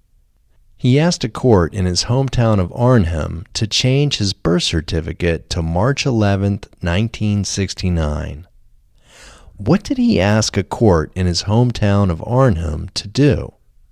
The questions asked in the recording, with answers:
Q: What did he ask a court in his hometown of Arnhem to do?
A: He asked a court in his hometown of Arnhem to change his birth certificate to March 11, 1969.